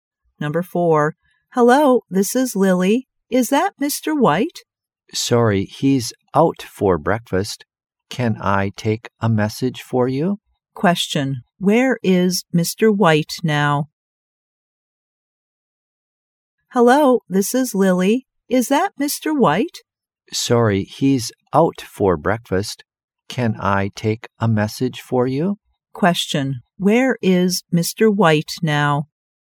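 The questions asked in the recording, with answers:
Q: Where is Mr. White now?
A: Out for breakfast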